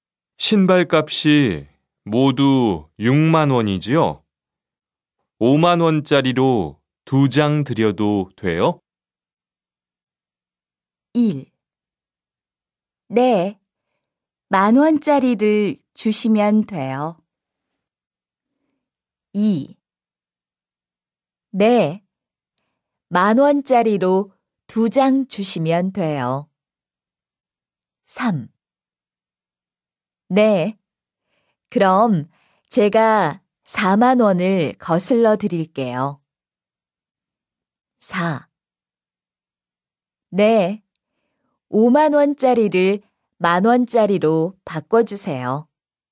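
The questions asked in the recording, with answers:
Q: 신발 값이 모두 6만 원이지요? 5만 원짜리로 두 장 드려도 돼요?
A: 3: 네, 그럼 제가 4만 원을 거슬러 드릴게요.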